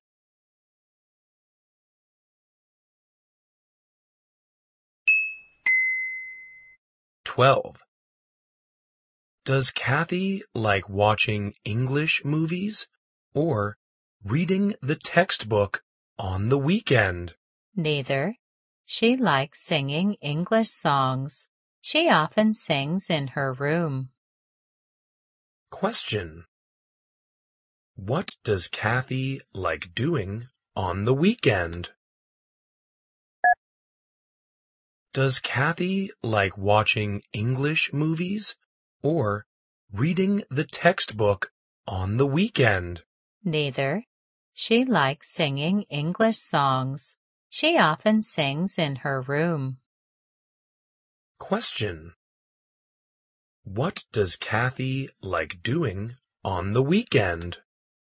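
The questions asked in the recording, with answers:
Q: What does Kathy like doing on the weekend?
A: Singing English songs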